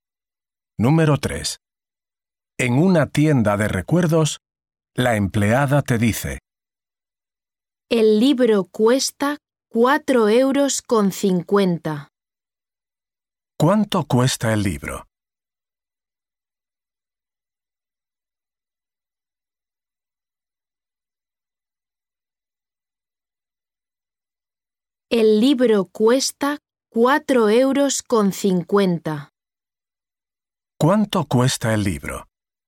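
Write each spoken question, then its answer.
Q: ¿Cuánto cuesta el libro?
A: 4,50 €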